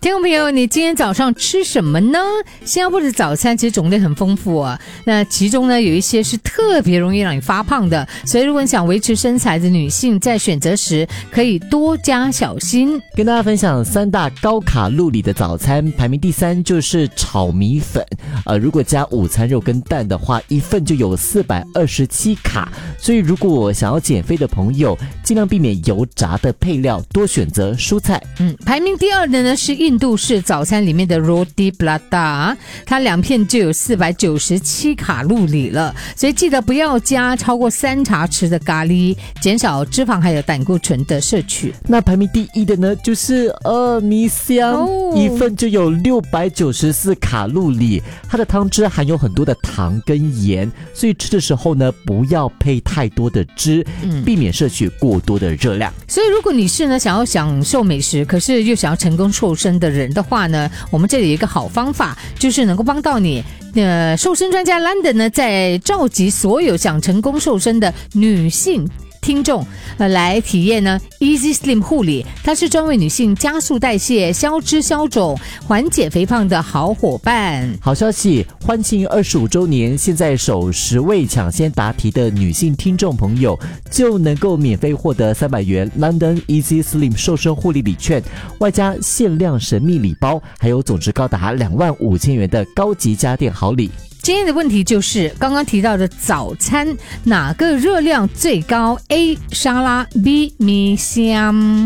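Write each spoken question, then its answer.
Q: 今天的问题就是刚刚提到的早餐哪个热量最高, A 沙拉, B 米香,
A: B: 米香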